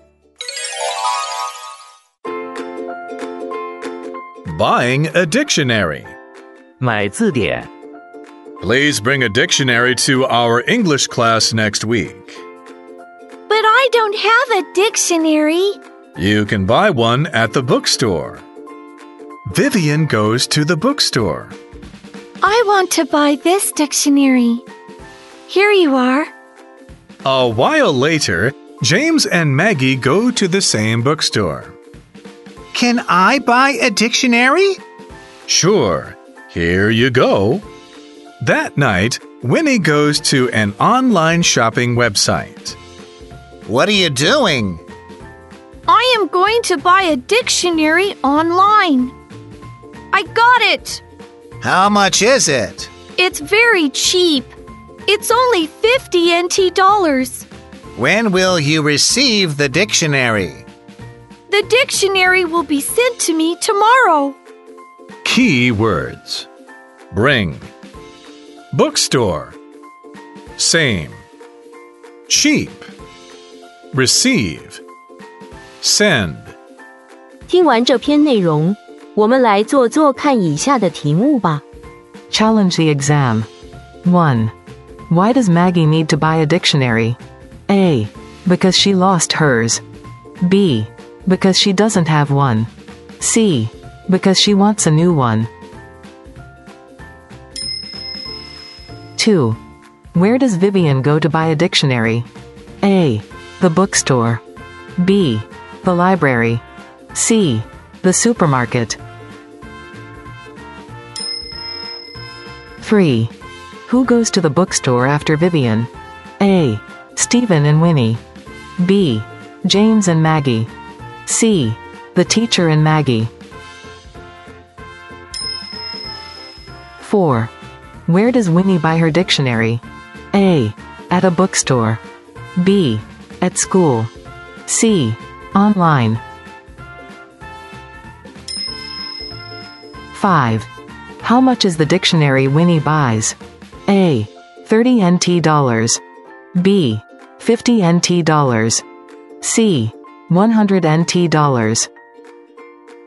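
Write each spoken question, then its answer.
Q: Where does Vivian go to buy a dictionary?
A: A: The bookstore.

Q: Who goes to the bookstore after Vivian?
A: B: James and Maggie.

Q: Where does Winnie buy her dictionary?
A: C: Online.

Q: How much is the dictionary Winnie buys?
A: B: 50 NT dollars.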